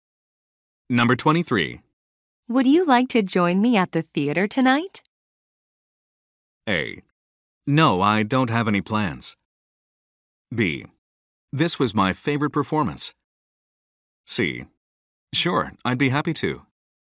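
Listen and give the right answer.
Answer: C: Sure, I'd be happy to.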